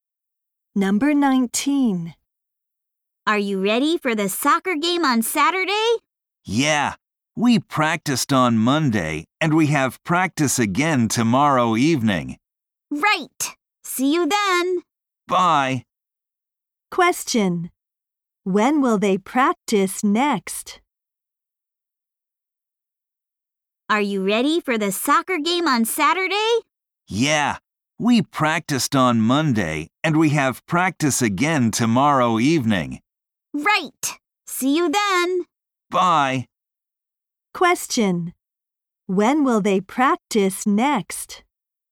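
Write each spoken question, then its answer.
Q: When will they practice next?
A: Tomorrow evening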